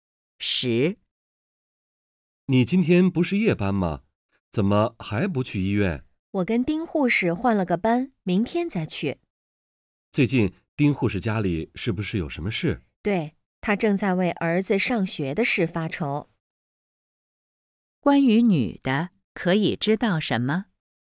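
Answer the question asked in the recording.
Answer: 她和丁护士换了班,明天再去医院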